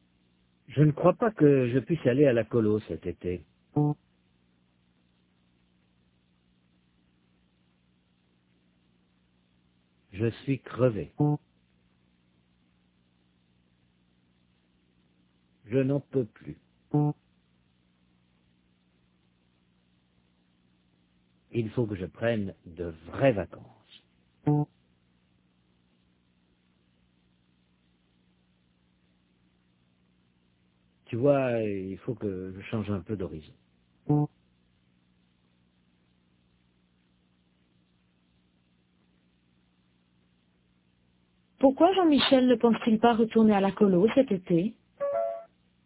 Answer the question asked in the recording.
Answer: Parce qu'il est crevé, il n'en peut plus.